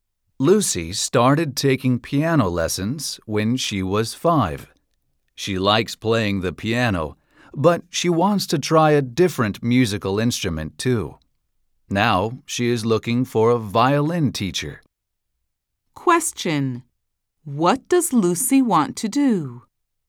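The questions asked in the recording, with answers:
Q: What does Lucy want to do?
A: Learn to play the violin (a different instrument)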